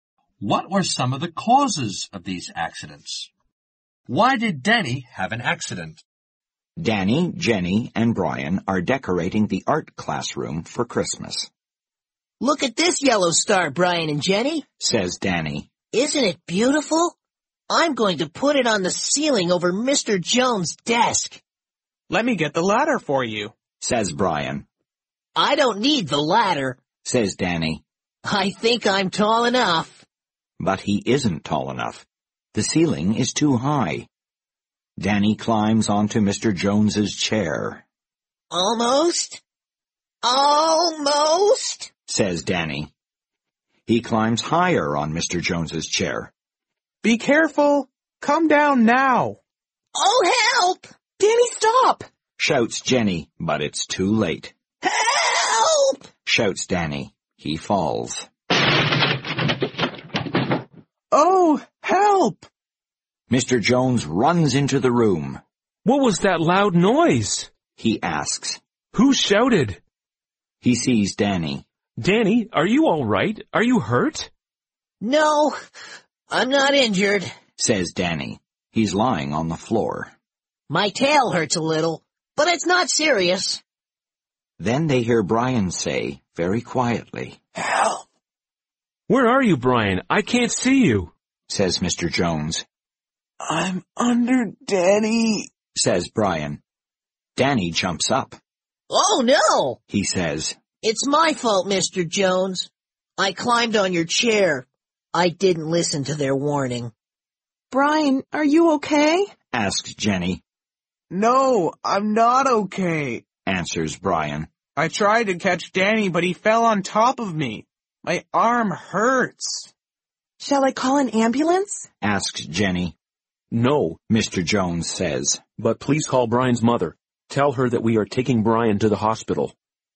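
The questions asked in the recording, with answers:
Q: Why did Danny have an accident?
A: He climbed onto Mr. Jones's chair to reach the high ceiling without the ladder, and he didn't listen to the warnings.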